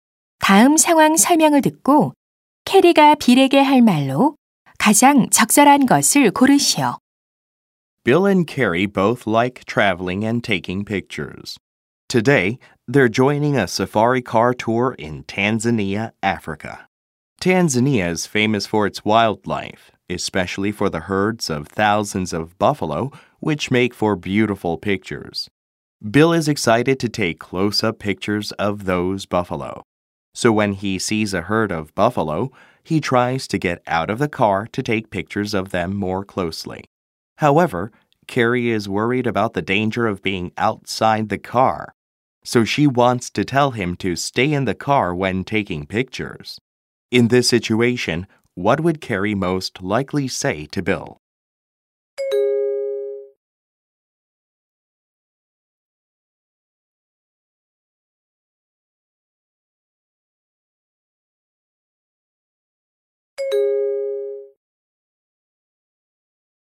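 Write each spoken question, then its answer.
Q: In this situation, what would Carrie most likely say to Bill?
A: You'd better stay in the car when taking pictures; it's dangerous to get out.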